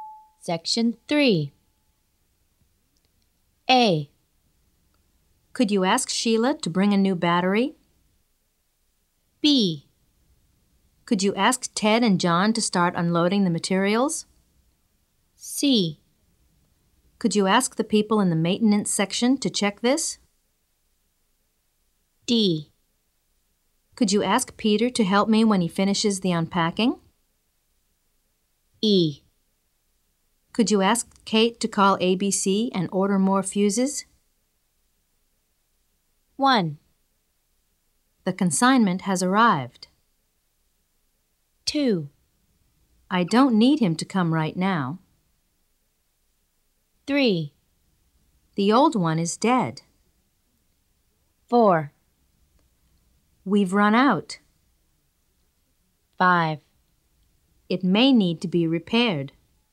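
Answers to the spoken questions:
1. B: Could you ask Ted and John to start unloading the materials?
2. D: Could you ask Peter to help me when he finishes the unpacking?
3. A: Could you ask Sheila to bring a new battery?
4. E: Could you ask Kate to call ABC and order more fuses?
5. C: Could you ask the people in the maintenance section to check this?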